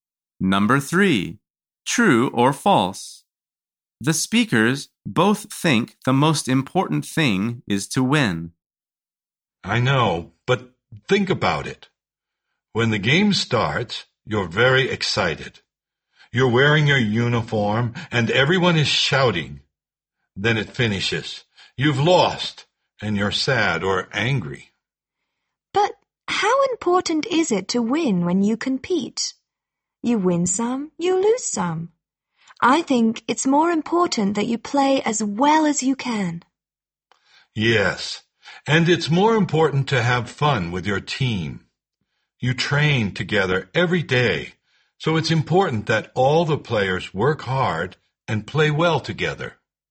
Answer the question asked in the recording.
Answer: The answer is false.